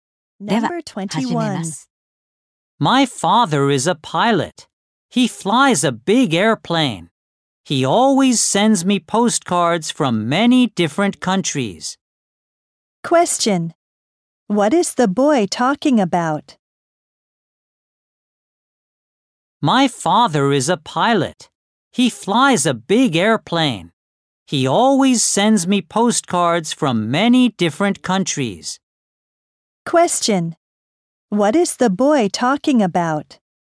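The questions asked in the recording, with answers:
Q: What is the boy talking about?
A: His father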